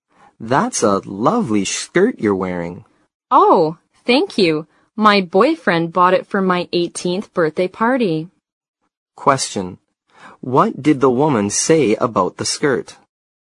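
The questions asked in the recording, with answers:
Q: What did the woman say about the skirt?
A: Her boyfriend bought it for her 18th birthday party.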